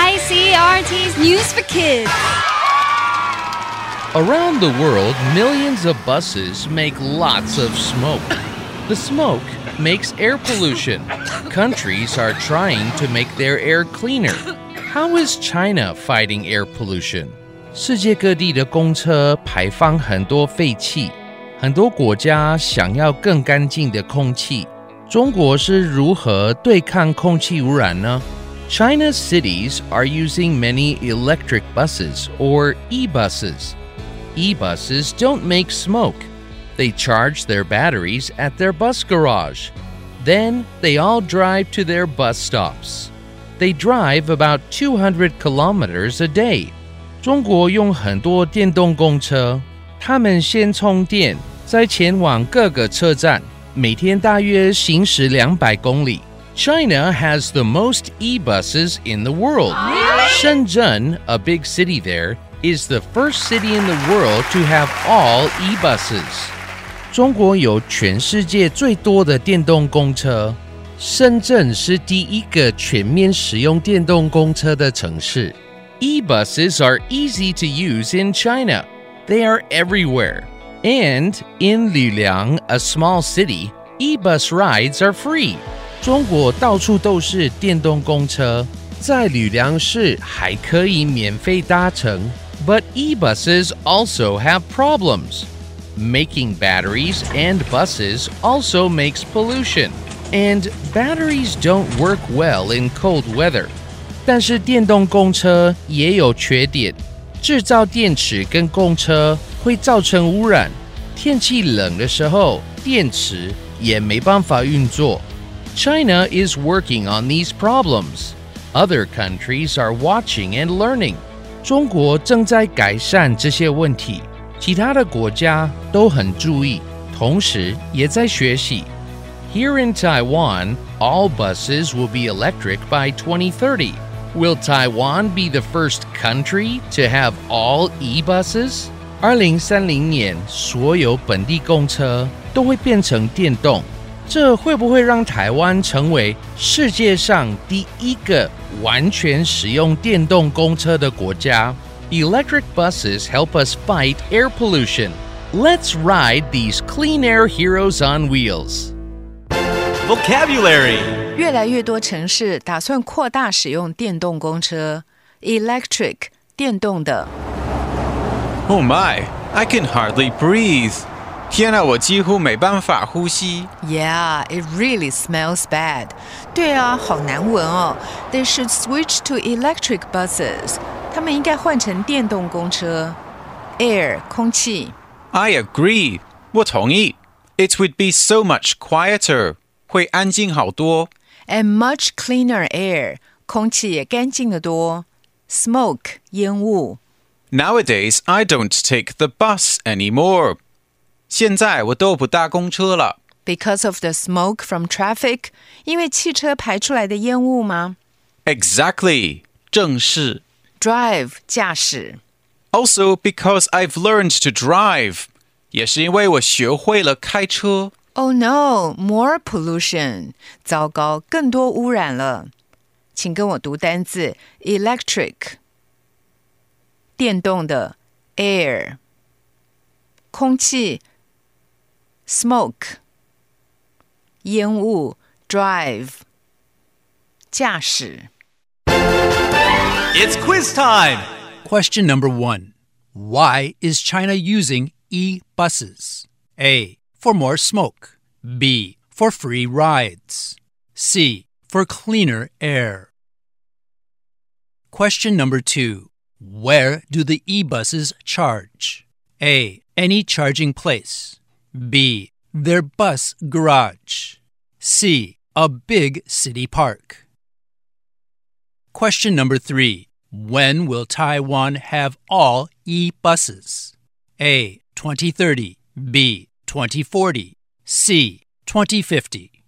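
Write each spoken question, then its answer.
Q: Why is China using e-buses?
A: C: For cleaner air.

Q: Where do the e-buses charge?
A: B: Their bus garage.

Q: When will Taiwan have all e-buses?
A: A: 2030.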